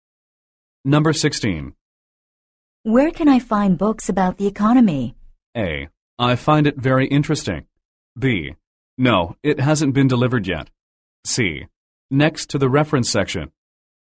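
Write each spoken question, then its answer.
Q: Where can I find books about the economy?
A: C: Next to the reference section.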